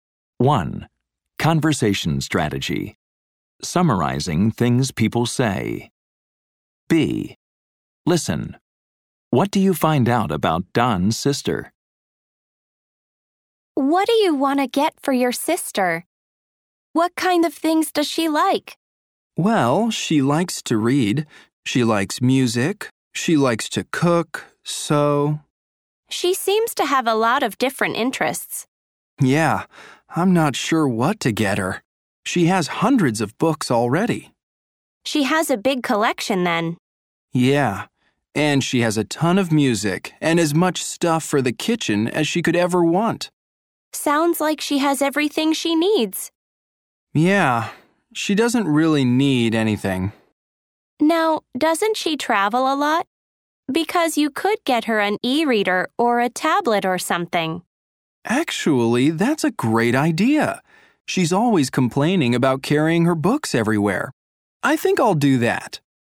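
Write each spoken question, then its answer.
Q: What do you find out about Don's sister?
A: She likes to read, listen to music, cook and sew; she has hundreds of books and everything she needs, and she complains about carrying her books when she travels.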